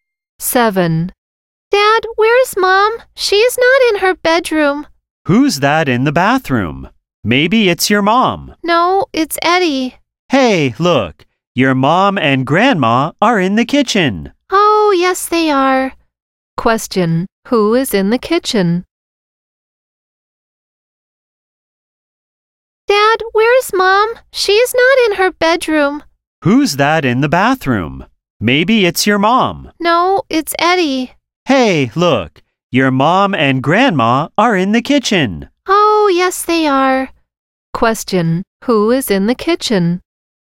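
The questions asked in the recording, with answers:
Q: Who is in the kitchen?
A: His mom and grandma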